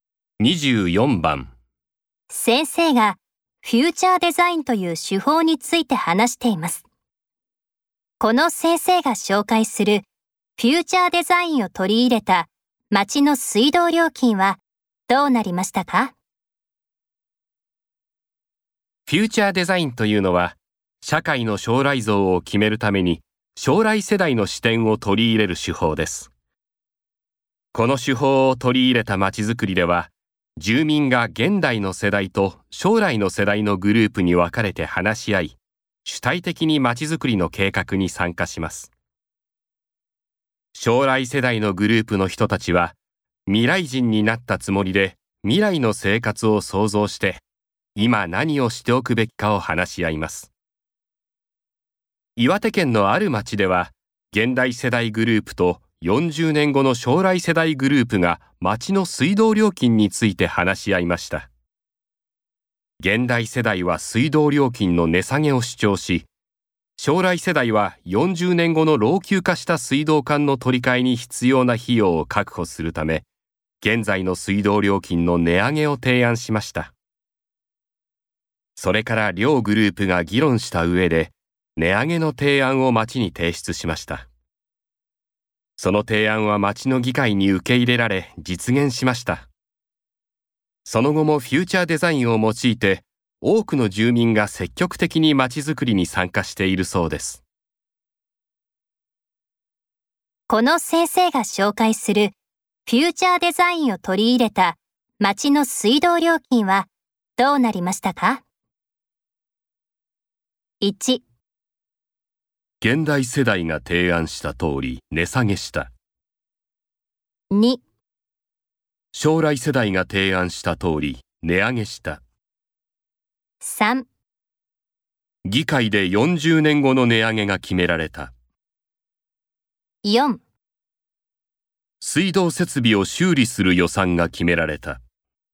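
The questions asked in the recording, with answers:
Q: この先生が紹介するフューチャーデザインを取り入れた町の水道料金はどうなりましたか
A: 2: 将来世代が提案した通り値上げした。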